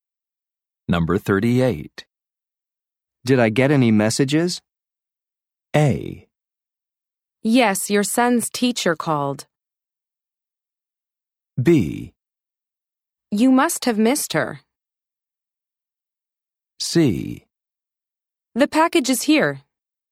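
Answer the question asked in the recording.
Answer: A: Yes, your son's teacher called.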